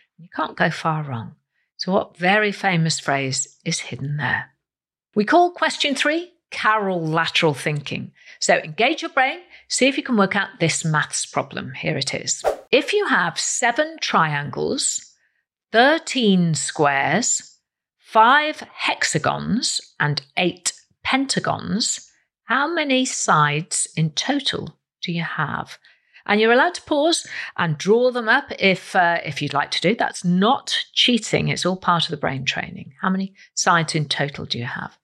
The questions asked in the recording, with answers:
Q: If you have 7 triangles, 13 squares, 5 hexagons and 8 pentagons, how many sides in total do you have?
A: And the answer is a total of 143 sides.